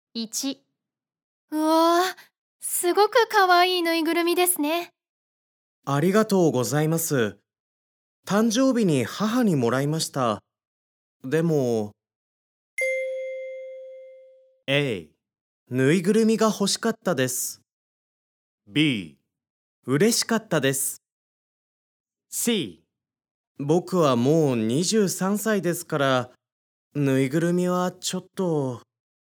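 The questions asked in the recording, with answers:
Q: ありがとうございます。誕生日に母にもらいました。でも...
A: C: 僕はもう23歳ですから、ぬいぐるみはちょっと...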